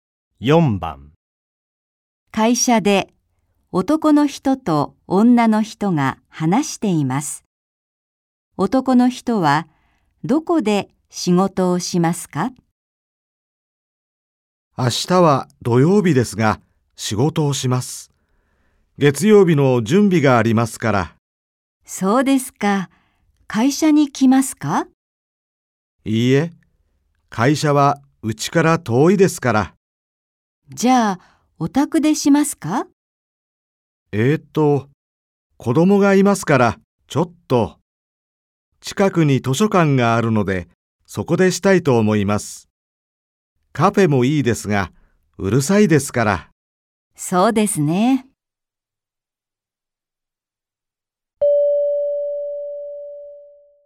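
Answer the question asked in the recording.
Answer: 図書館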